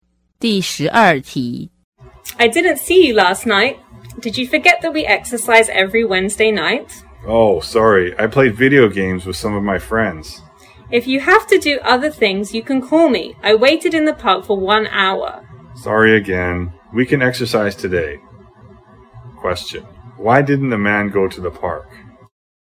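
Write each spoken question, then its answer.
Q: Why didn't the man go to the park?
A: He played video games with friends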